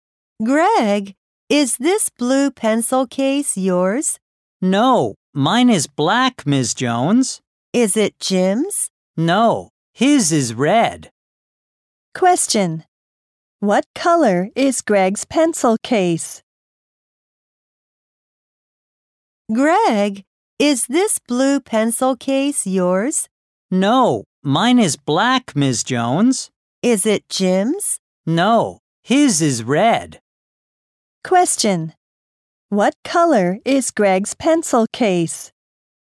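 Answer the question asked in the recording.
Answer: Black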